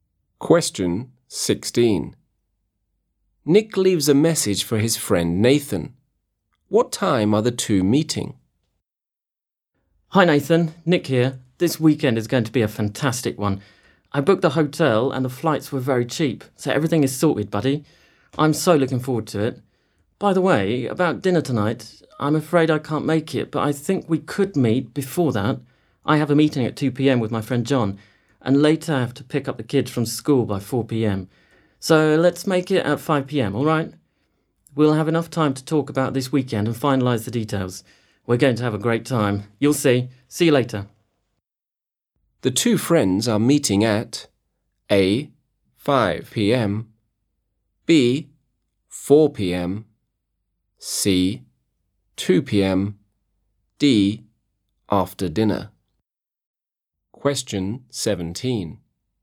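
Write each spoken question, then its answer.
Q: What time are the two meeting?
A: A: 5 p.m.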